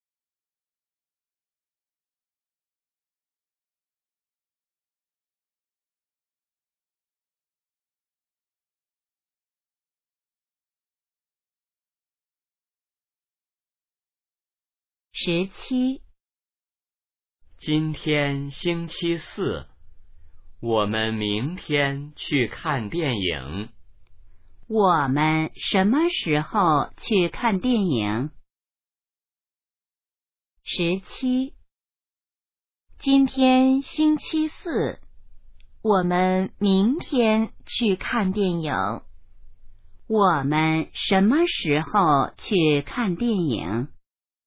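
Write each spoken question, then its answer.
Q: 我们什么时候去看电影?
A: 明天(星期五)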